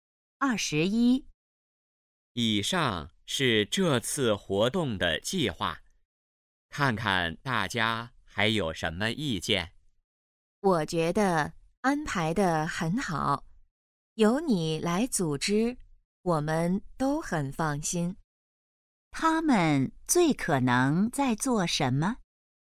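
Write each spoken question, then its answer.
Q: 他们最可能在做什么?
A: 讨论活动计划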